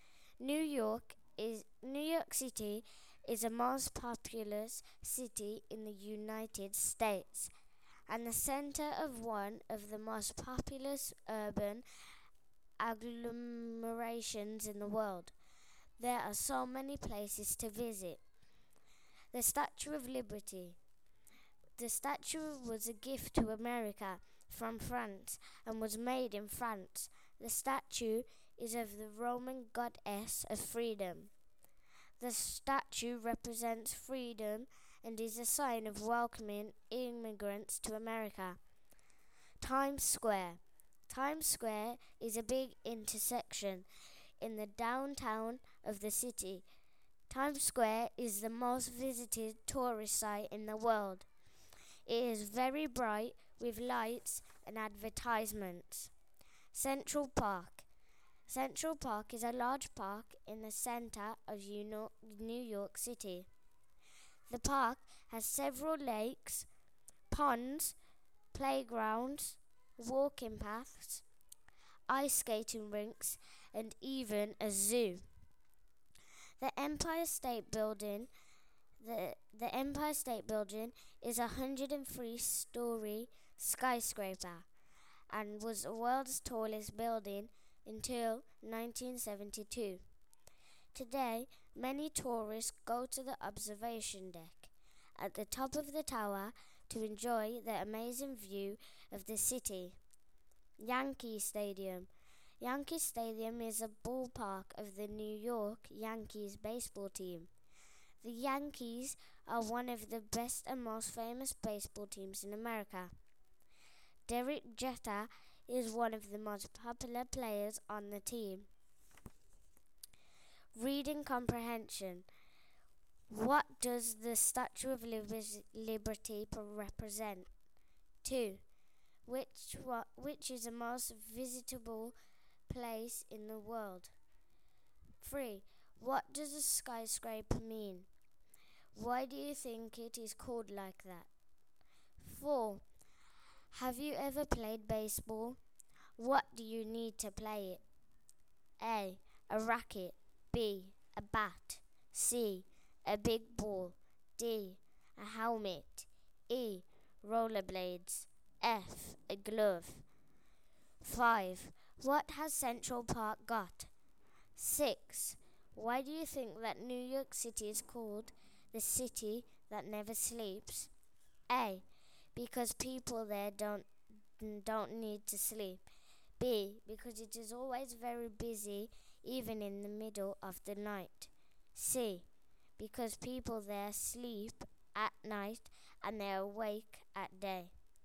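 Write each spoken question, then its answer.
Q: What does the Statue of Liberty represent?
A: Freedom, and welcoming immigrants to America

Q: Which is the most visitable place in the world?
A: Times Square

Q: What has Central Park got?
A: Lakes, ponds, playgrounds, walking paths, ice skating rinks and a zoo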